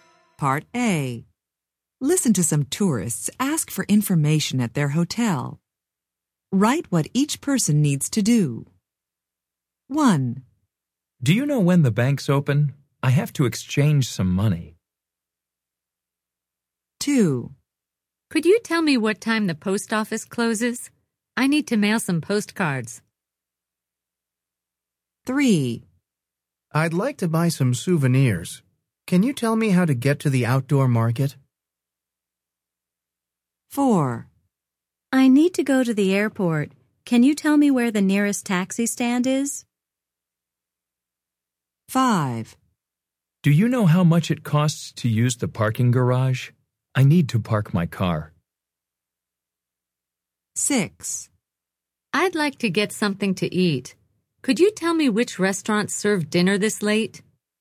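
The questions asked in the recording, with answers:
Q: Write what each person needs to do.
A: exchange some money

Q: Write what each person needs to do.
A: mail some postcards

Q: Write what each person needs to do.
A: buy some souvenirs

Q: Write what each person needs to do.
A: go to the airport

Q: Write what each person needs to do.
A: park their car

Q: Write what each person needs to do.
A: get something to eat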